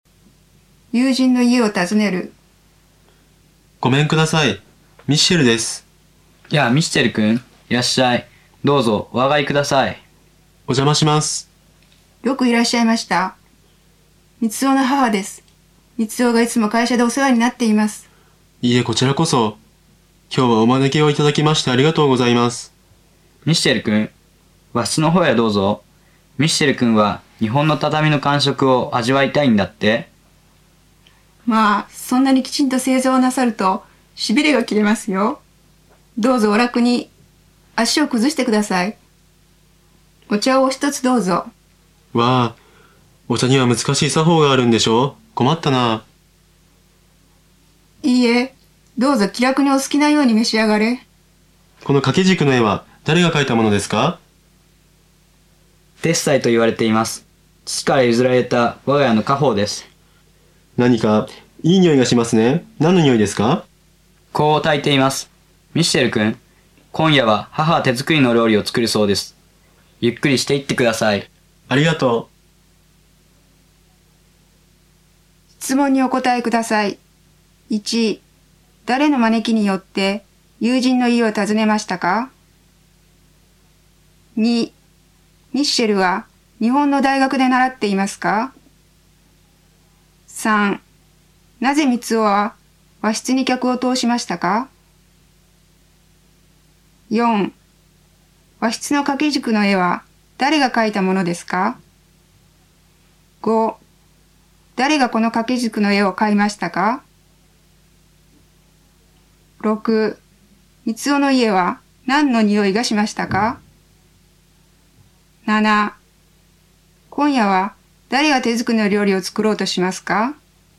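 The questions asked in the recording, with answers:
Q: ミッシェルは日本の大学で習っていますか?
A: いいえ、会社で働いています

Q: なぜ三男は和室に客を通しましたか?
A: ミッシェルが畳の感触を味わいたいから

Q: 誰がこの掛け軸の絵を買いましたか?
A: 誰も買っていない。父から譲られた家宝

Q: 三男の家は何の匂いがしましたか?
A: 香の匂い

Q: 今夜は誰が手作りの料理を作ろうとしますか?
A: 三男の母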